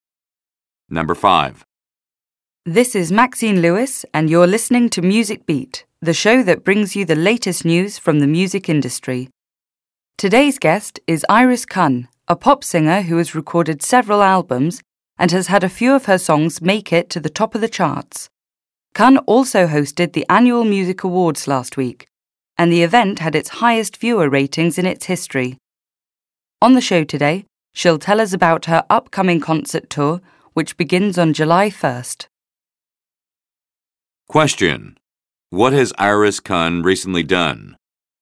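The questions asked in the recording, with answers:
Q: What has Iris Kun recently done?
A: She hosted the annual Music Awards.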